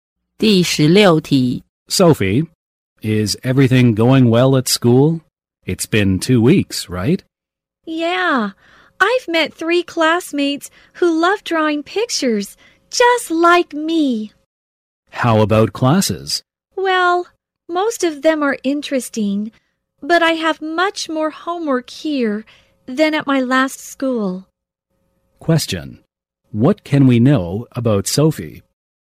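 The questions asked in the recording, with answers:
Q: What can we know about Sophie?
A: She has more homework than at her last school and has met classmates who love drawing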